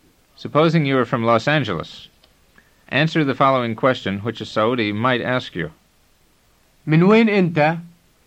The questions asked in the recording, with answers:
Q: Supposing you are from Los Angeles, answer the following question, which a Saudi might ask you. من وين أنت؟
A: أنا من مدينة لوس أنجلوس.